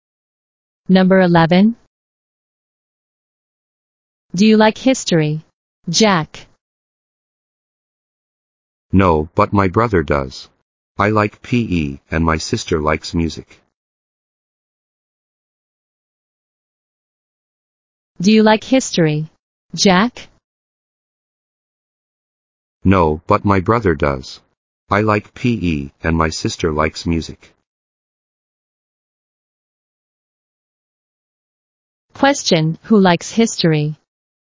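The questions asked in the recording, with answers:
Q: who likes history?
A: Jack's brother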